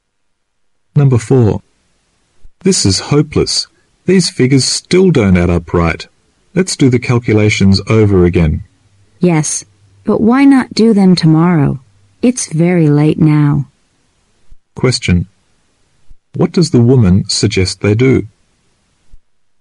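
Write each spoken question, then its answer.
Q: What does the woman suggest they do?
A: Do the calculations again tomorrow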